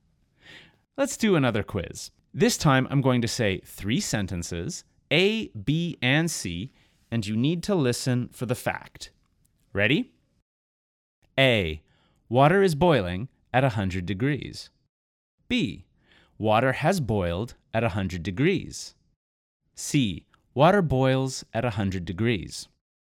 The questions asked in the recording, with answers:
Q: you need to listen for the fact.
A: The answer is C.